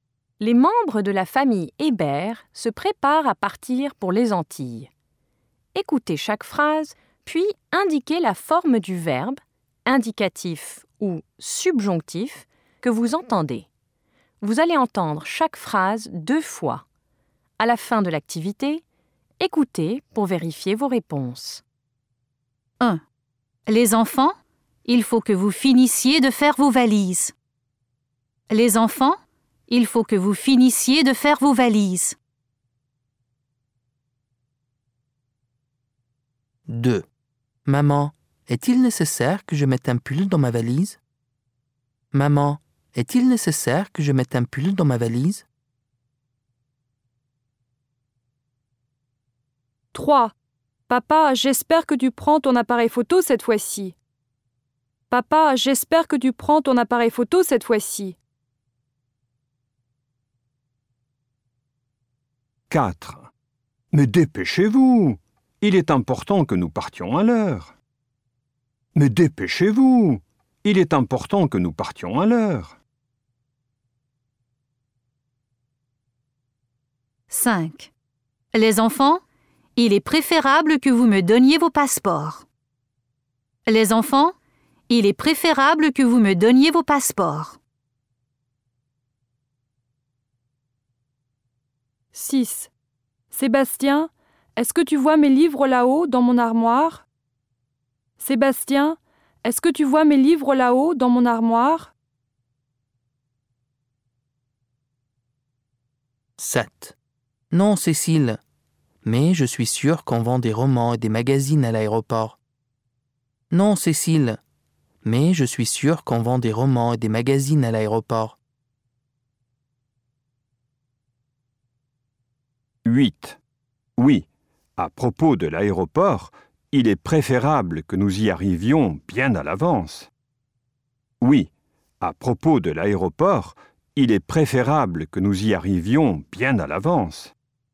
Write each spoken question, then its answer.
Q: Maman, est-il nécessaire que je mette un pull dans ma valise?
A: Subjonctif

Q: Papa, j'espère que tu prends ton appareil photo cette fois-ci.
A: Indicatif

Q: Mais dépêchez-vous! Il est important que nous partions à l'heure.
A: Subjonctif

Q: Les enfants, il est préférable que vous me donniez vos passeports.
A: Subjonctif

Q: Sébastien, est-ce que tu vois mes livres là-haut dans mon armoire?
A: Indicatif

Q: Non, Cécile. Mais je suis sûr qu'on vend des romans et des magazines à l'aéroport.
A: Indicatif

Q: Oui, à propos de l'aéroport, il est préférable que nous y arrivions bien à l'avance.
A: Subjonctif